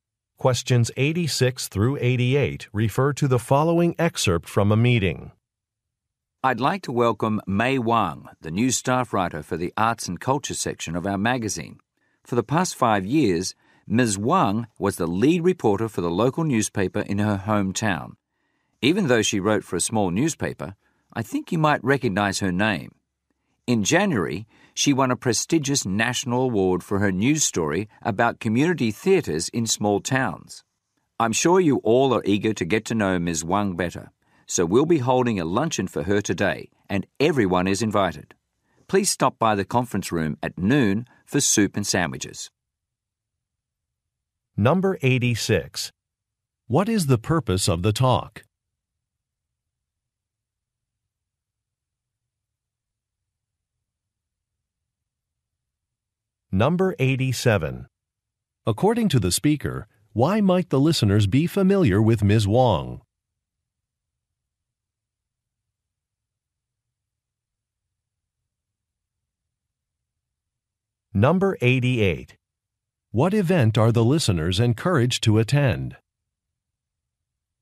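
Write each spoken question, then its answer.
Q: What is the purpose of the talk?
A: To welcome a new staff writer

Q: What event are the listeners encouraged to attend?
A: A luncheon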